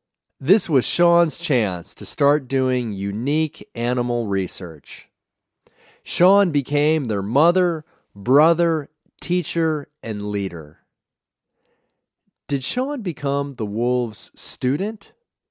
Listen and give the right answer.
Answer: No, he didn't become the wolves' student.